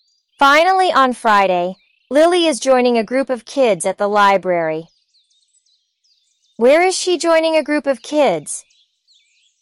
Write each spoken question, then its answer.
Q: Where is she joining a group of kids?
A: At the library. She's joining a group of kids at the library.